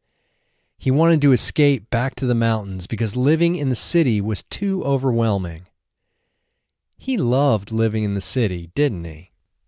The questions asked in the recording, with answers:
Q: He loved living in the city, didn't he?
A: No, he didn't love living in the city.